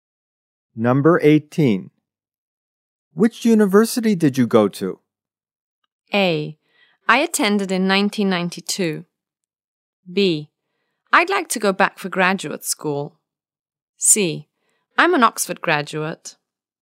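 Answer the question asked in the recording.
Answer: C: I'm an Oxford graduate.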